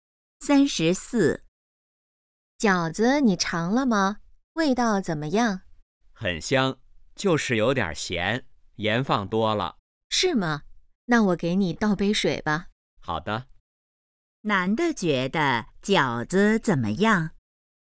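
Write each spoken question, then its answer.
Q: 男的觉得饺子怎么样?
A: 有点咸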